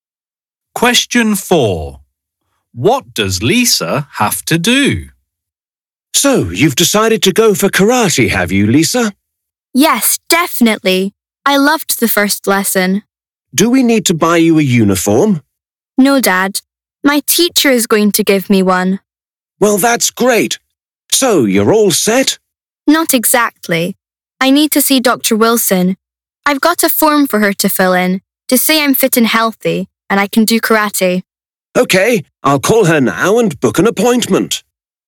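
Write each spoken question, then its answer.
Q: What does Lisa have to do?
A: see the doctor to get a form filled in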